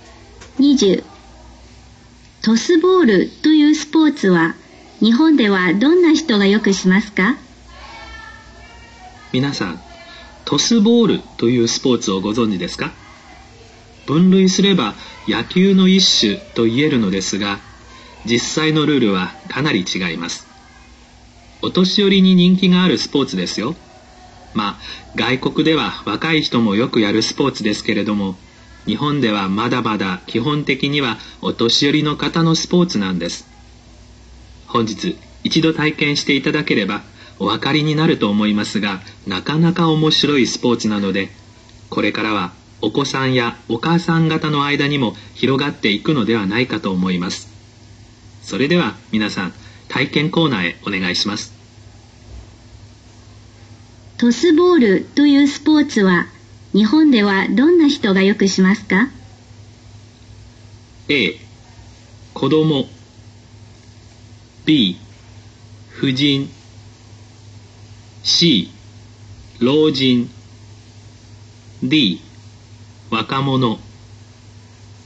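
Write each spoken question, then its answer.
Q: トスボールというスポーツは日本ではどんな人がよくしますか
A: C: 老人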